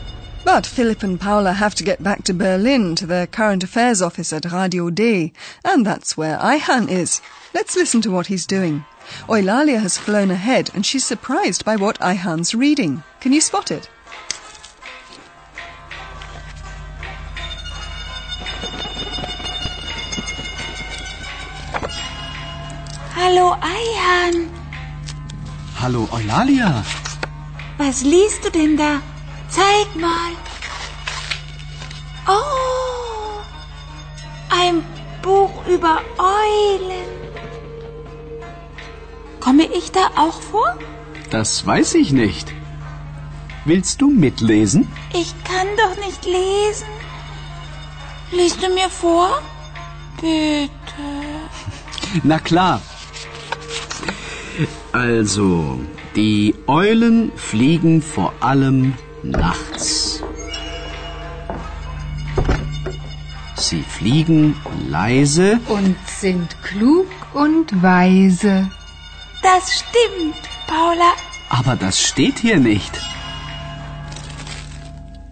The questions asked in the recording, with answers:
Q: Can you spot it?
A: Oh, ein Buch über Eulen.